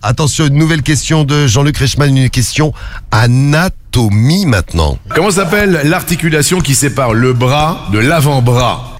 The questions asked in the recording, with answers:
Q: Comment s'appelle l'articulation qui sépare le bras de l'avant-bras?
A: Le coude.